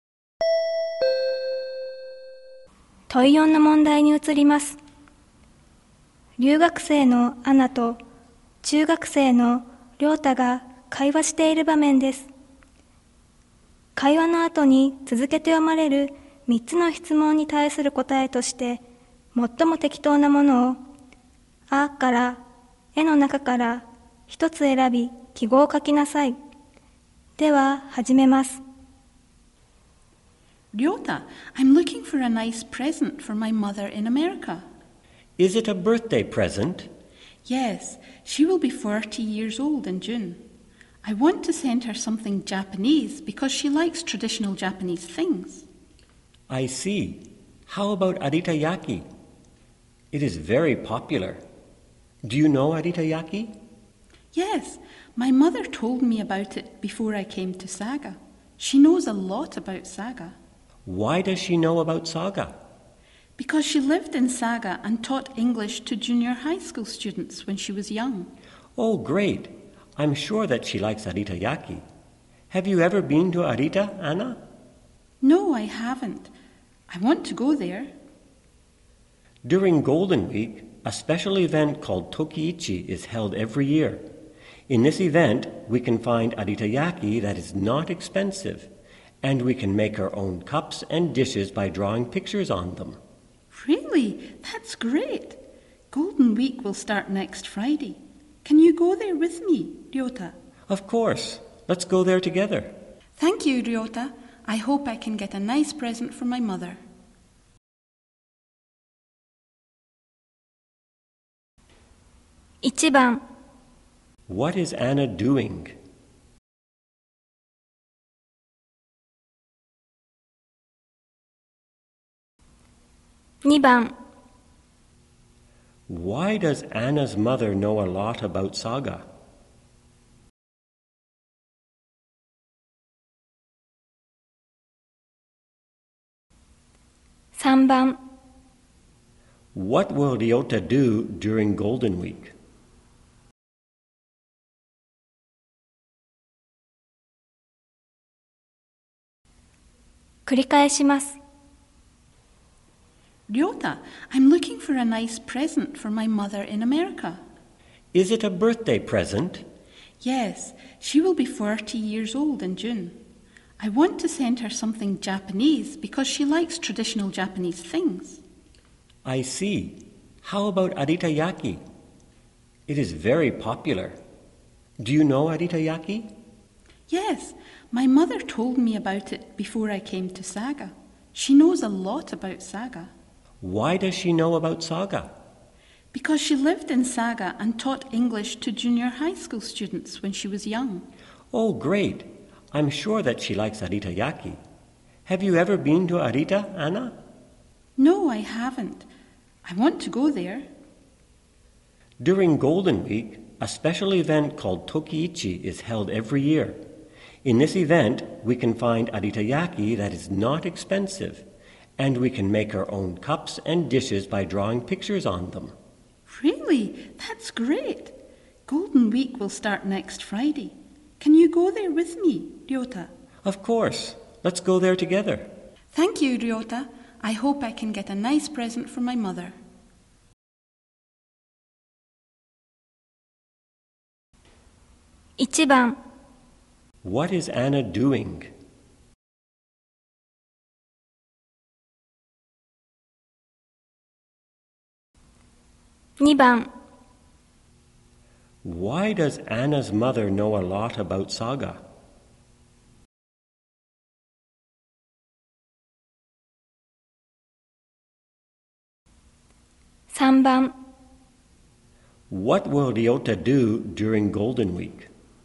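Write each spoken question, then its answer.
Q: What is Anna doing?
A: Looking for a birthday present for her mother

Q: Why does Anna's mother know a lot about Saga?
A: She lived in Saga and taught English to junior high school students when she was young

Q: What will Ryota do during Golden Week?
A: Go to the Tokiichi event in Arita with Anna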